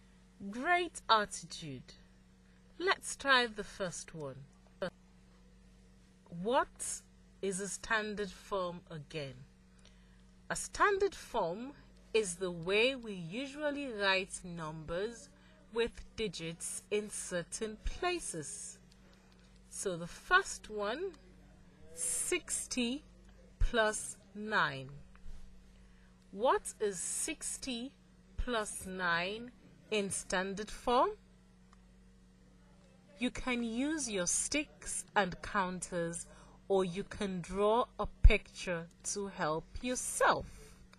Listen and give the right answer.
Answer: Okay, I've got it. The answer is 69.